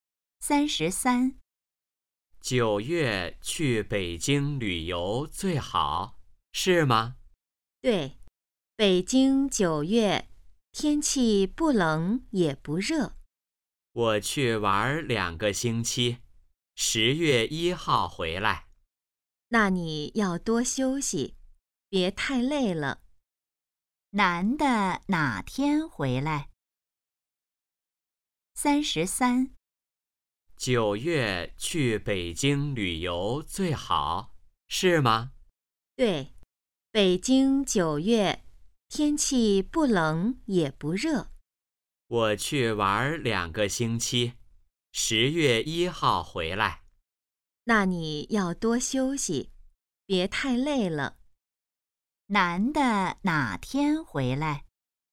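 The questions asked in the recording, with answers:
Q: 男的哪天回来?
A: 10月1号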